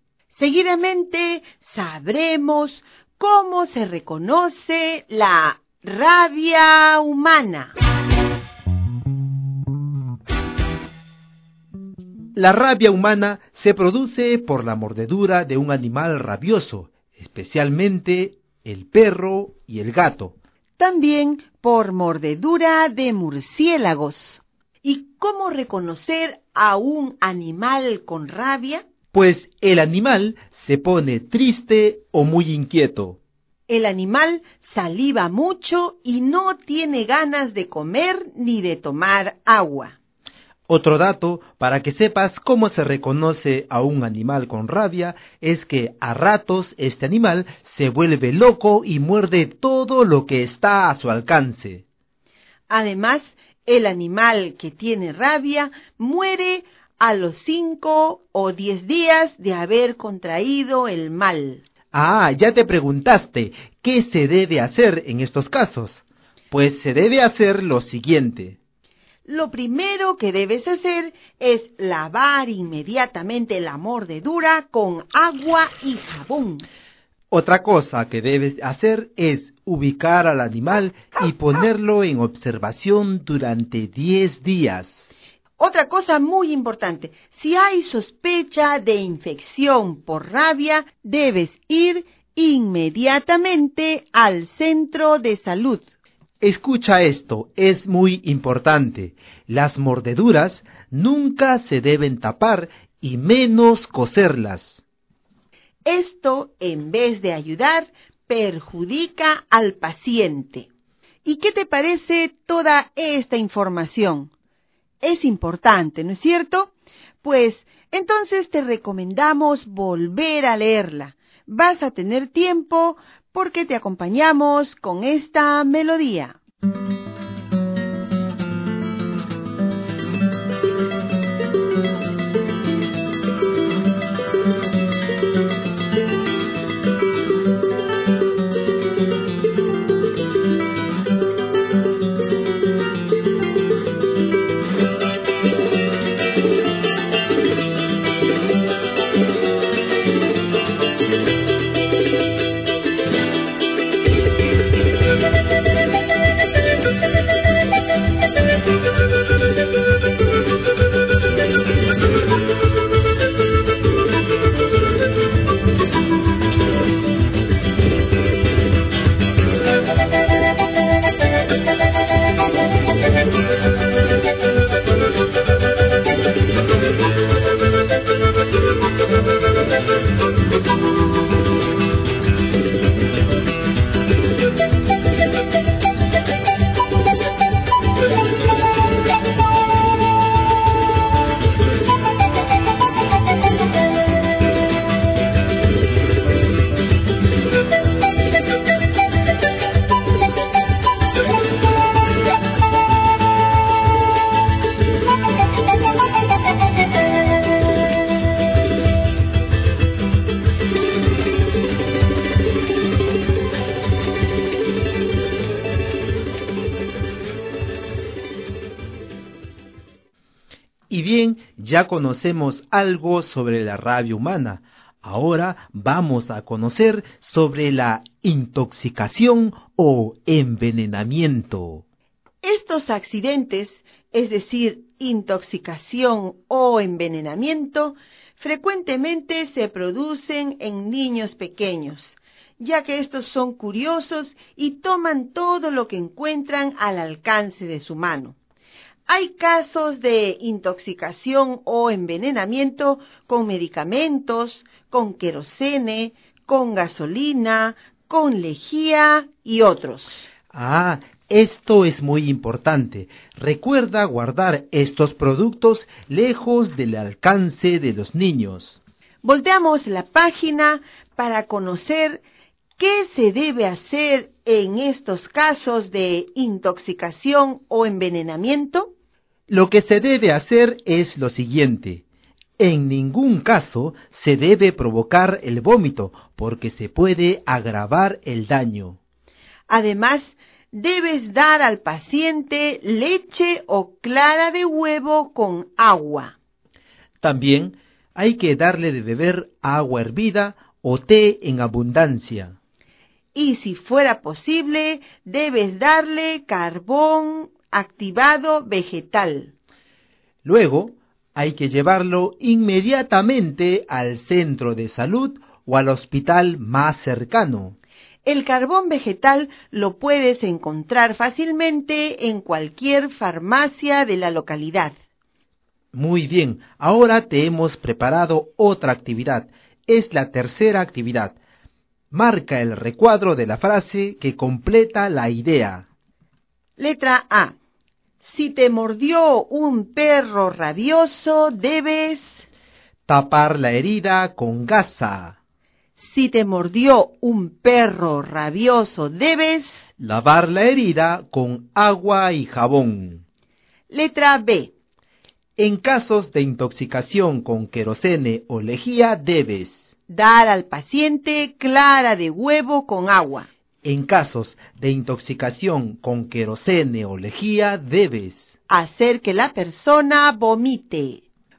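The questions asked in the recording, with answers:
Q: Letra A. Si te mordió un perro rabioso, debes...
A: lavar la herida con agua y jabón

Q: En casos de intoxicación con querosene o lejía, debes...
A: dar al paciente clara de huevo con agua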